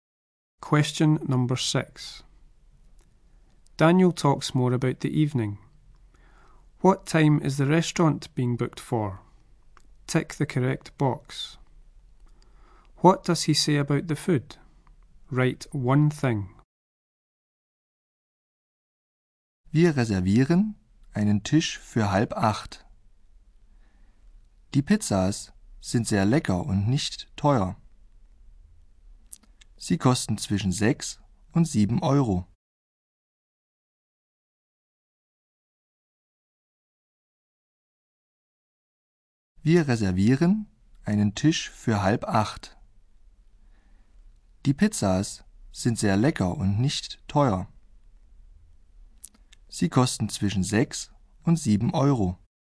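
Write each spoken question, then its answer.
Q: What time is the restaurant being booked for?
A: 7:30

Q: What does he say about the food?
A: The pizzas are tasty and not expensive (6-7 euros)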